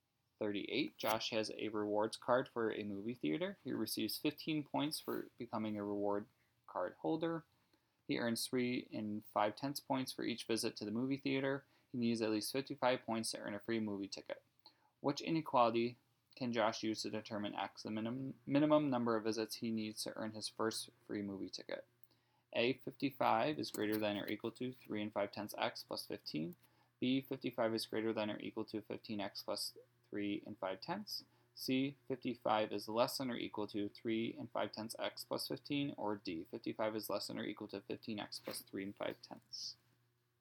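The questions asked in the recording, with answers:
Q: Which inequality can Josh use to determine x, the minimum number of visits he needs to earn his first free movie ticket?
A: C: 55 is less than or equal to 3 5/10 x plus 15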